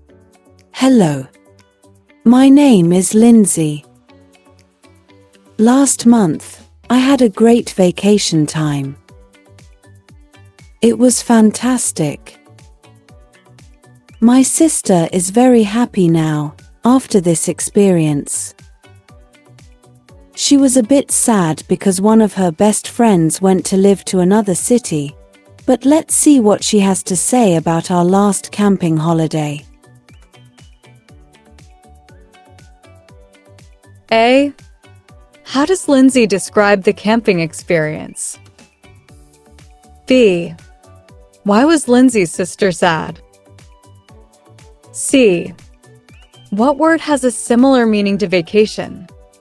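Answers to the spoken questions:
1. It was fantastic
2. One of her best friends went to live in another city
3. holiday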